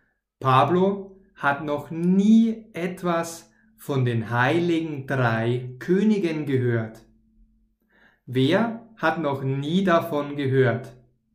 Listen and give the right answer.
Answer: Pablo. Pablo hat noch nie davon, noch nie von den heiligen drei Königen gehört.